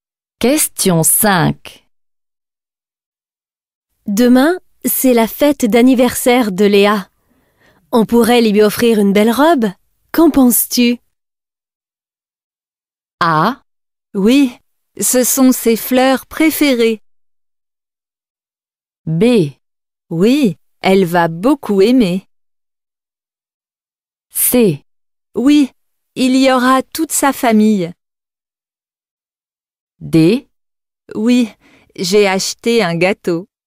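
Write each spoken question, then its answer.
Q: Qu'en penses-tu?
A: B: Oui, elle va beaucoup aimer.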